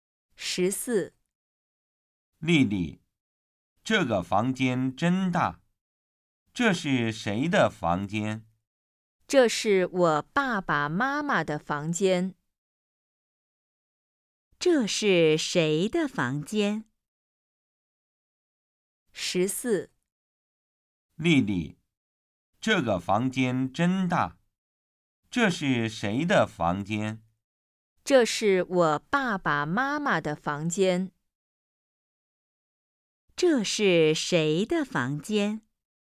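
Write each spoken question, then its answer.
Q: 这是谁的房间?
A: 丽丽爸爸妈妈的房间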